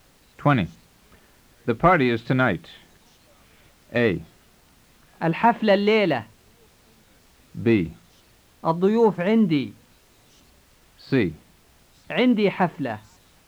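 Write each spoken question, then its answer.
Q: The party is tonight.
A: A: الحفلة الليلة.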